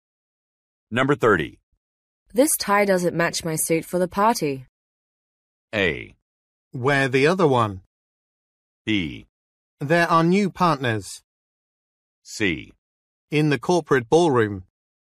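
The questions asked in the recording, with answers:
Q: This tie doesn't match my suit for the party.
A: A: Wear the other one.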